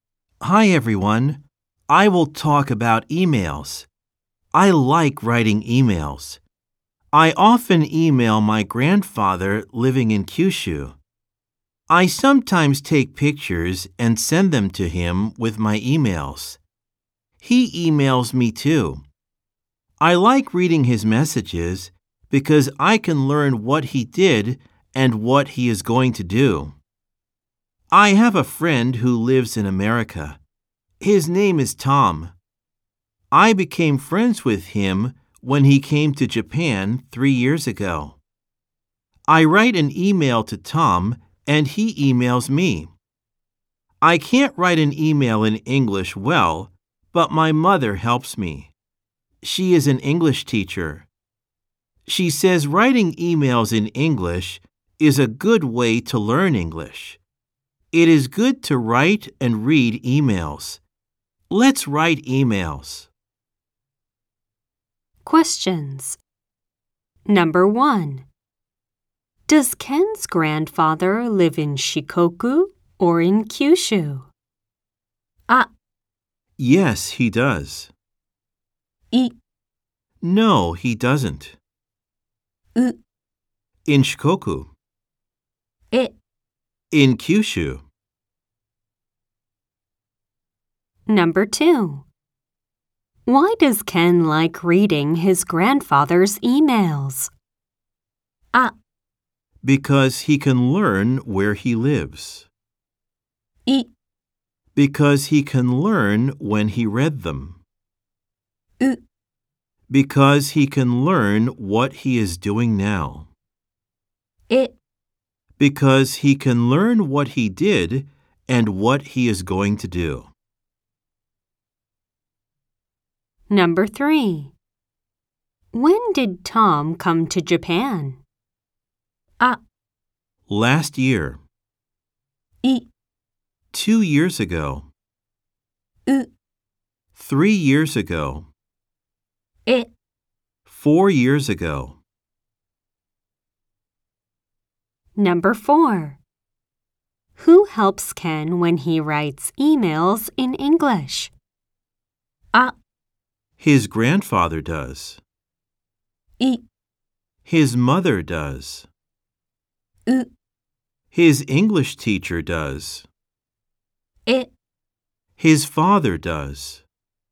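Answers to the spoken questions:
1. E: In Kyushu.
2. E: Because he can learn what he did and what he is going to do.
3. U: 3 years ago.
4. I: His mother does.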